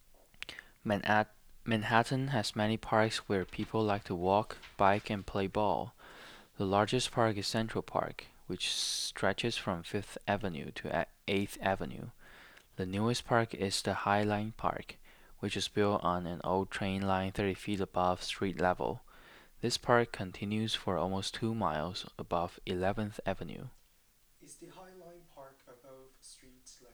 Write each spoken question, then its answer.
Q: Is the High Line Park above street level?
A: Yes, the High Line Park is above street level.